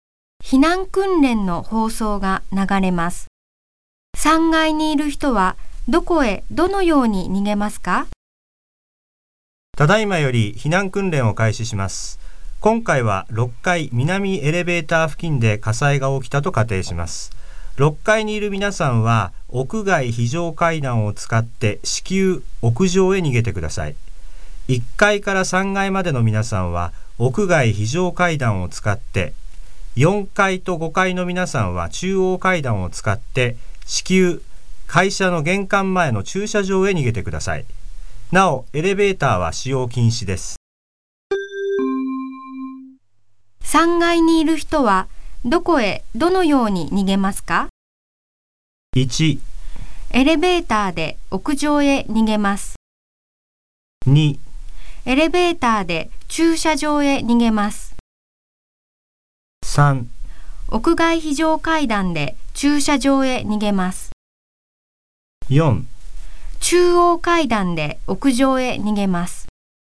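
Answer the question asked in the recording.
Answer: 3: 屋外非常階段で駐車場へ逃げます。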